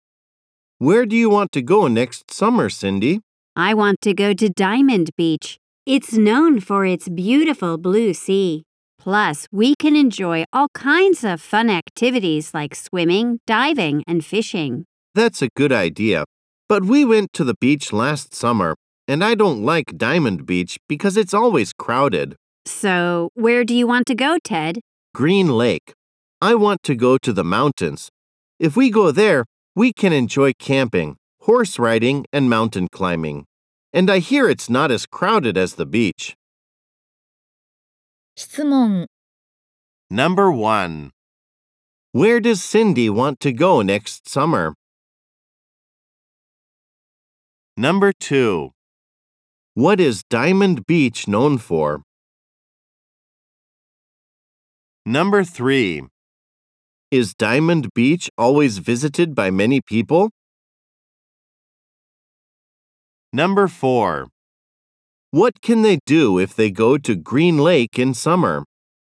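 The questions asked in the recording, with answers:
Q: Where does Cindy want to go next summer?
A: To Diamond Beach.

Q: What is Diamond Beach known for?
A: Its beautiful blue sea.

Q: Is Diamond Beach always visited by many people?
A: Yes, it is.

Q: What can they do if they go to Green Lake in summer?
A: Camping, horse riding, and mountain climbing.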